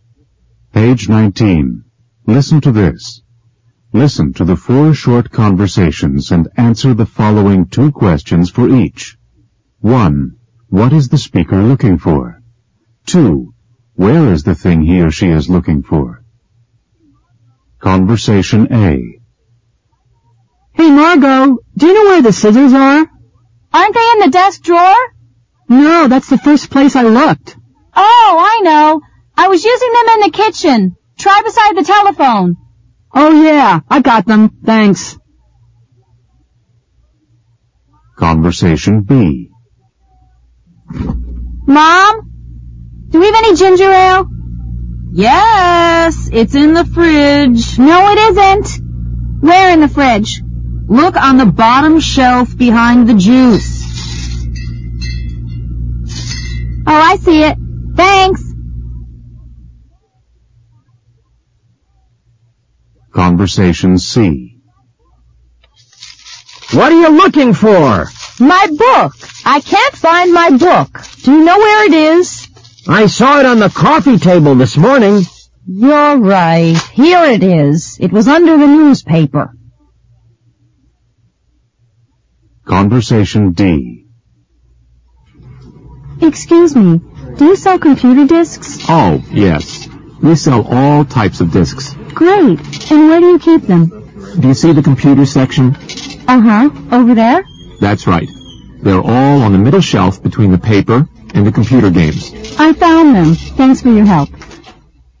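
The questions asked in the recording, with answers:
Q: What is the speaker looking for?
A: The scissors

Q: Where is the thing he or she is looking for?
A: Beside the telephone in the kitchen

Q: What is the speaker looking for?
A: Ginger ale

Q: Where is the thing he or she is looking for?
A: On the bottom shelf of the fridge, behind the juice

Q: What is the speaker looking for?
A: A book

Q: Where is the thing he or she is looking for?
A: On the coffee table, under the newspaper

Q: What is the speaker looking for?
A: Computer discs

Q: Where is the thing he or she is looking for?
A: On the middle shelf between the paper and the computer games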